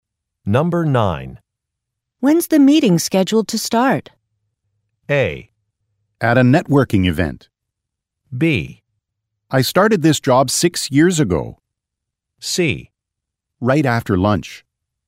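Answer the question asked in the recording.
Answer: C: Right after lunch.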